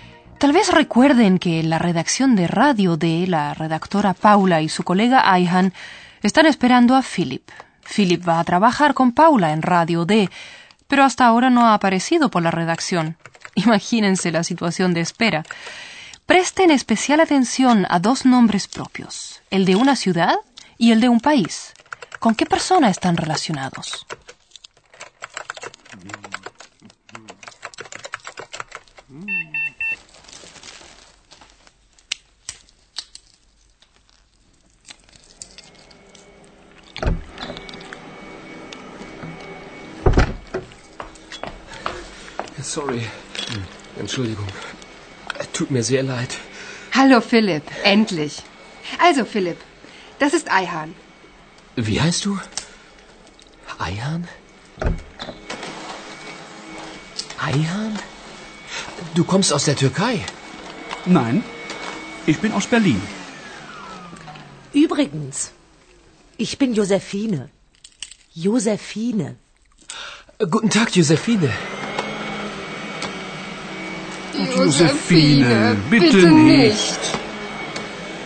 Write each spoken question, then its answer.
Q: ¿Con qué persona están relacionados?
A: Lo mismo ocurre con Ayhan.